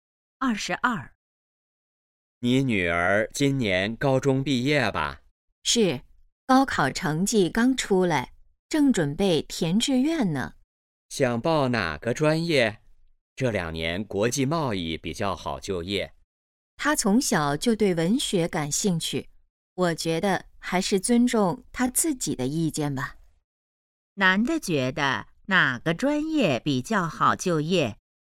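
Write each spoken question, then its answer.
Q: 男的觉得哪个专业比较好就业?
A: 国际贸易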